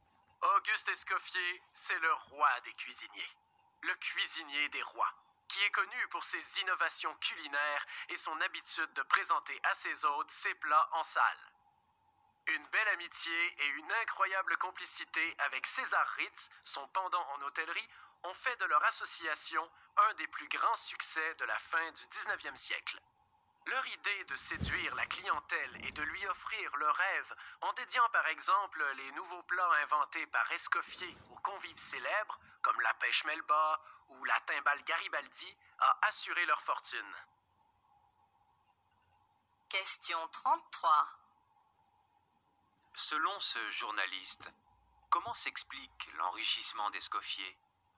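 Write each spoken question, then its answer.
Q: Selon ce journaliste, comment s'explique l'enrichissement d'Escoffier ?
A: Il a séduit la clientèle en dédiant ses nouveaux plats à des convives célèbres, en association avec César Ritz.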